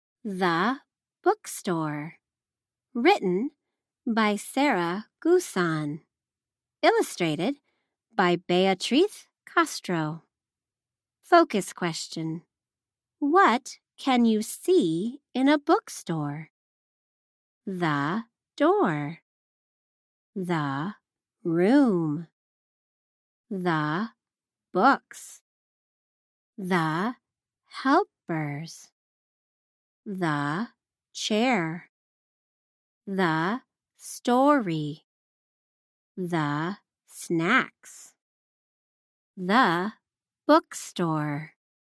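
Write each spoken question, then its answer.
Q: What can you see in a bookstore?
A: The door, the room, the books, the helpers, the chair, the story and the snacks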